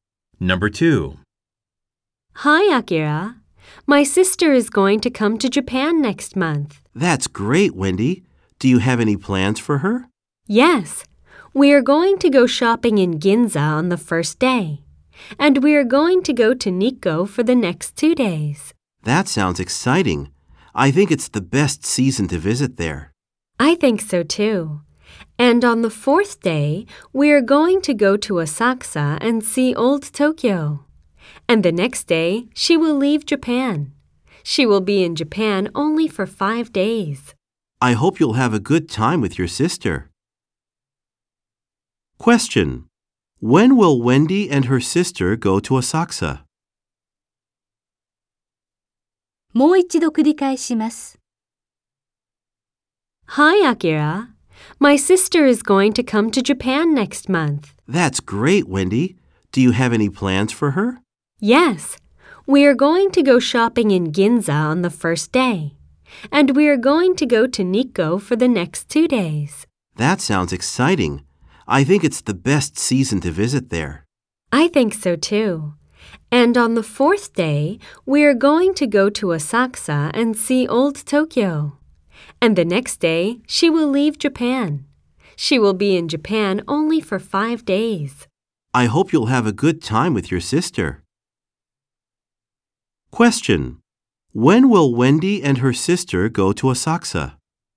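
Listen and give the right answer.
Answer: On the 4th day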